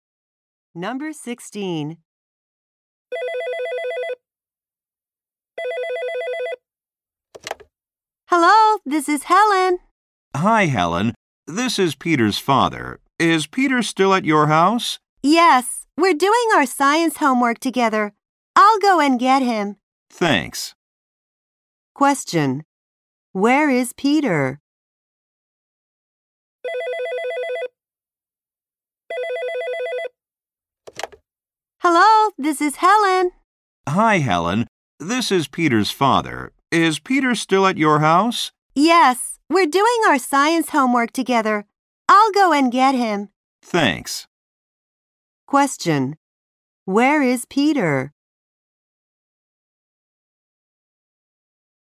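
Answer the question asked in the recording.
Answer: At Helen's house.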